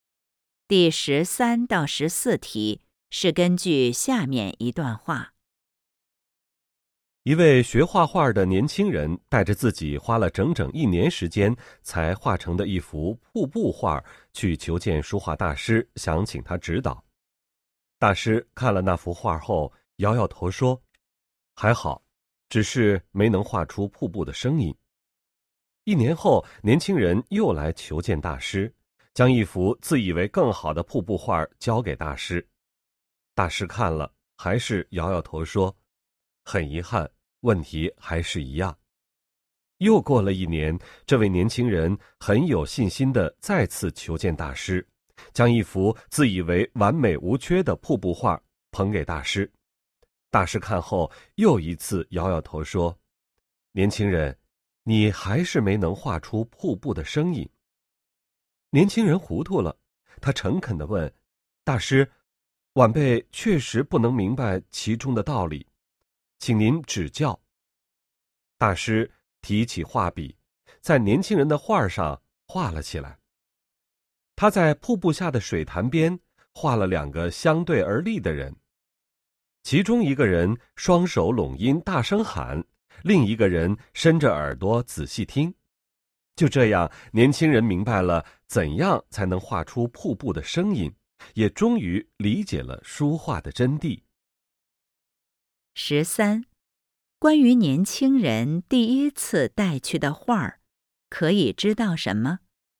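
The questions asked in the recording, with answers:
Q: 关于年轻人第一次带去的画儿,可以知道什么?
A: 花了整整一年画成,但没能画出瀑布的声音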